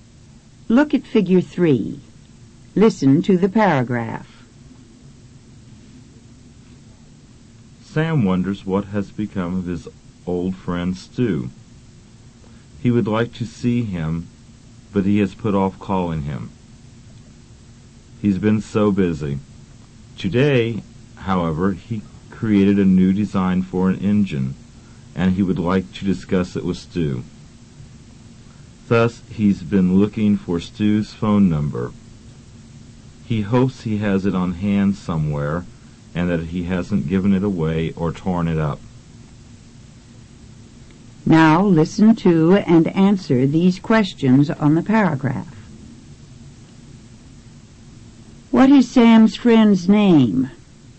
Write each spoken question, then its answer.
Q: What is Sam's friend's name?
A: Stu. His name is Stu.